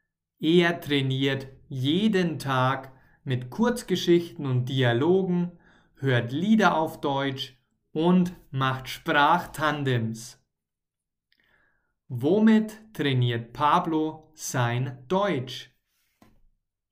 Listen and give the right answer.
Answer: Mit Kurzgeschichten und Dialogen